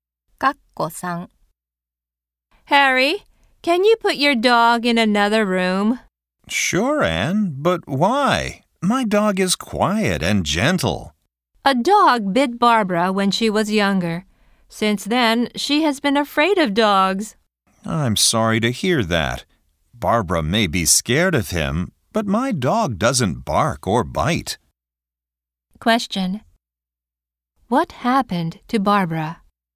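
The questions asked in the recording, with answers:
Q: What happened to Barbara?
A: A dog bit her when she was younger.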